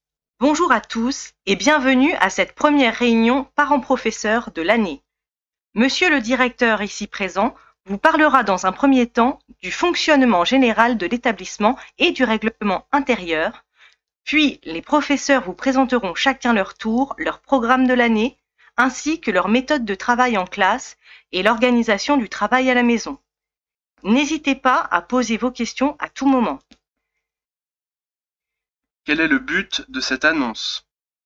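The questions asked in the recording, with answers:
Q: Quel est le but de cette annonce ?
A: Présenter le déroulement de la réunion parents-professeurs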